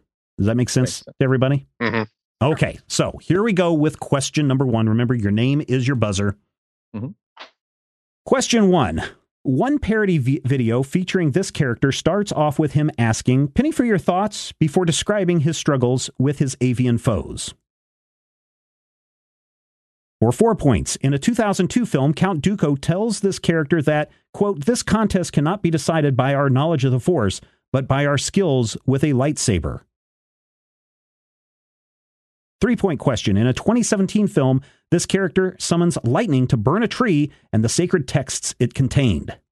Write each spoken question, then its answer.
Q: Question 1. One parody video featuring this character starts off with him asking, "Penny for your thoughts," before describing his struggles with his avian foes.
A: Correct. The answer is Yoda.